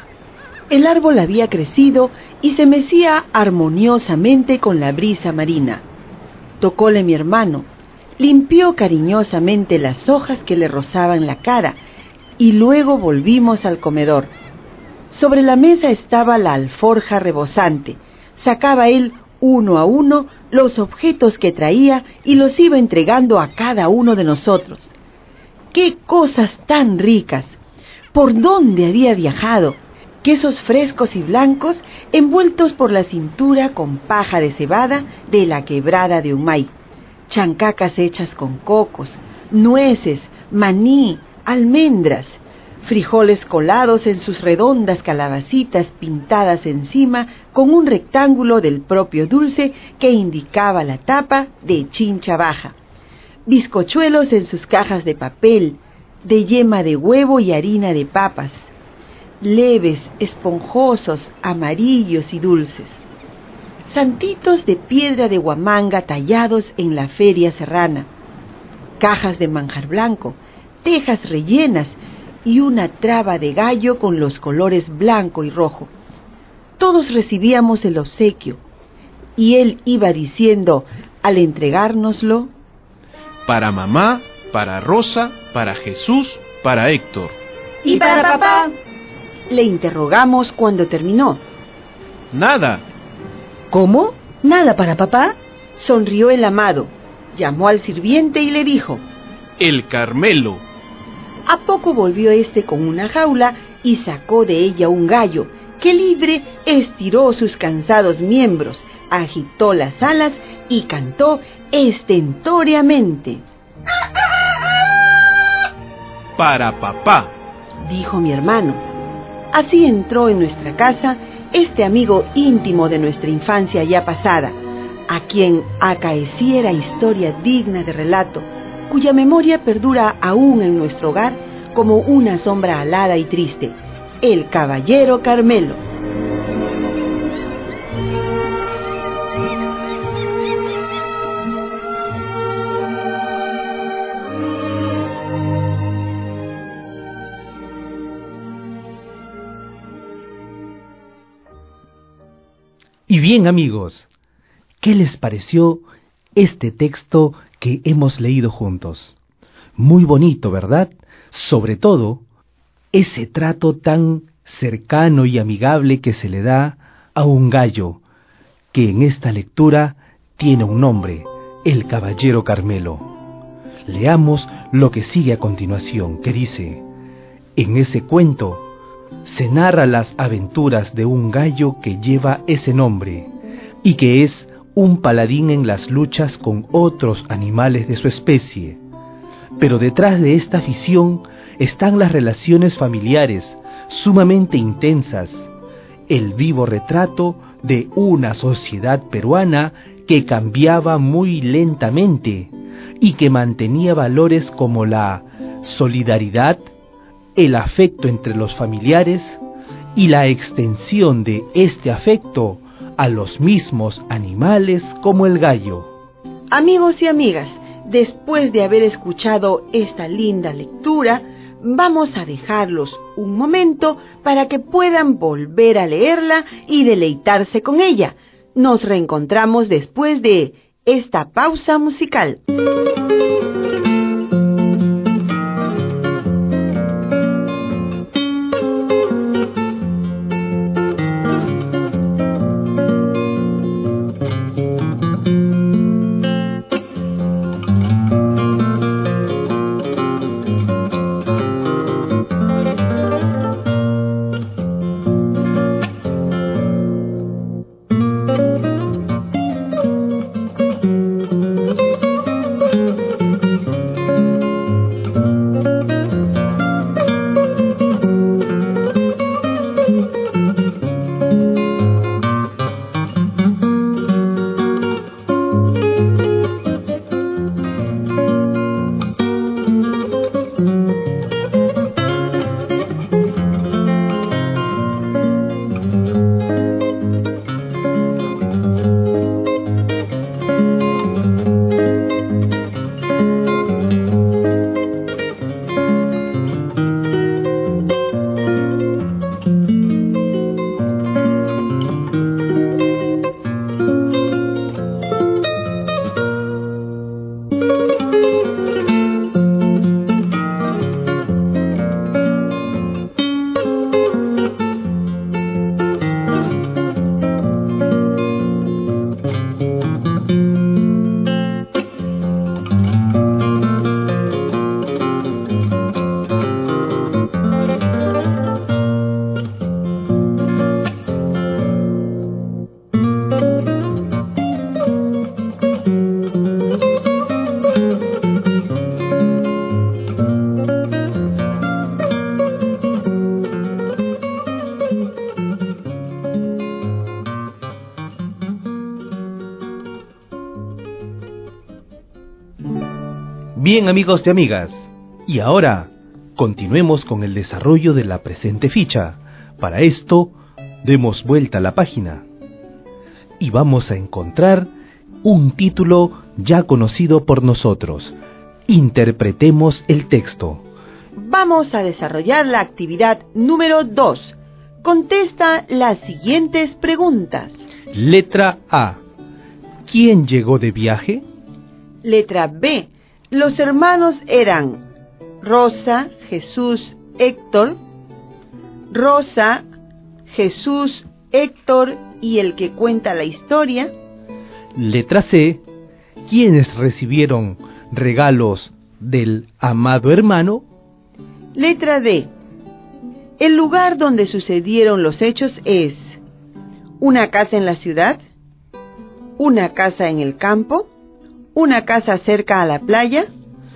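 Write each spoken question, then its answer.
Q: ¿Quién llegó de viaje?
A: El hermano del narrador

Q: Los hermanos eran Rosa, Jesús, Héctor. Rosa, Jesús, Héctor y el que cuenta la historia.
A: Rosa, Jesús, Héctor y el que cuenta la historia

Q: ¿Quiénes recibieron regalos del amado hermano?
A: Mamá, Rosa, Jesús, Héctor y papá (el gallo Carmelo)

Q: El lugar donde sucedieron los hechos es una casa en la ciudad, una casa en el campo, una casa cerca a la playa.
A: Una casa cerca a la playa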